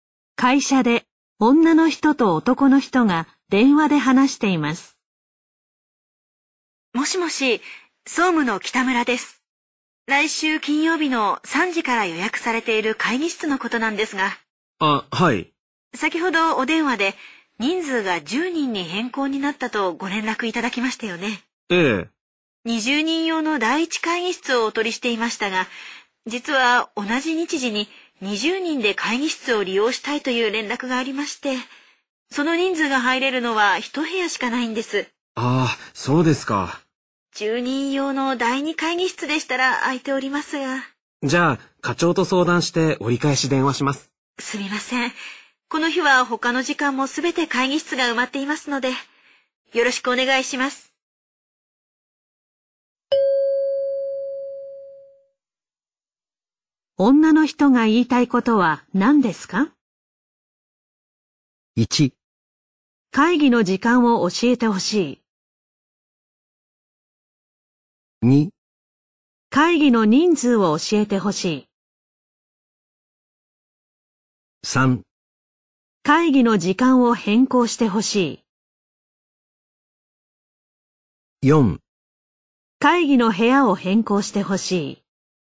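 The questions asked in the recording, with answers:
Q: 女の人が言いたいことは何ですか?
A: 4: 会議の部屋を変更してほしい。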